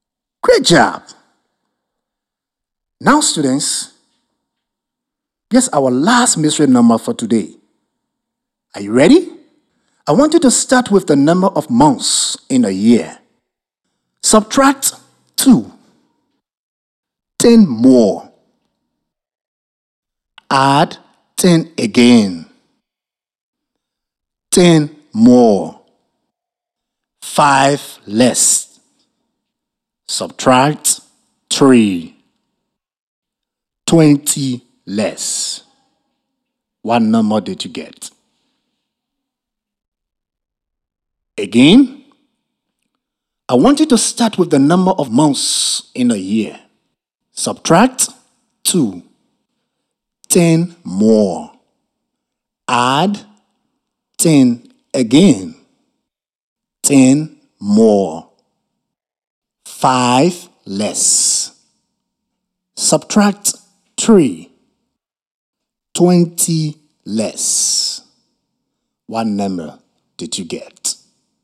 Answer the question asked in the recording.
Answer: The mystery number is 12.